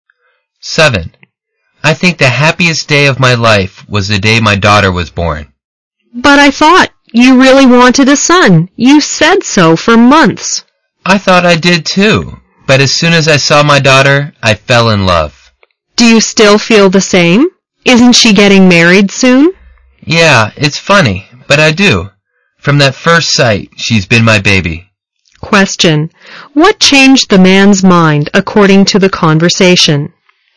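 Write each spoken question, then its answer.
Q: What changed the man's mind according to the conversation?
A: Seeing his daughter when she was born; he fell in love with her at first sight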